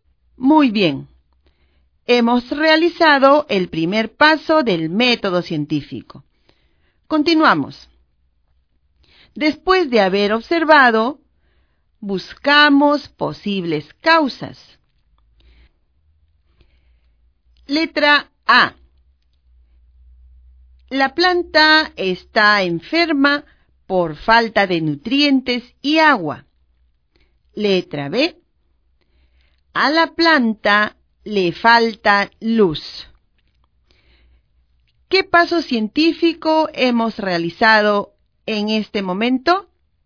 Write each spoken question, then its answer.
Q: ¿Qué paso científico hemos realizado en este momento?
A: Muy bien. Al buscar posibles causas, estamos planteando las hipótesis.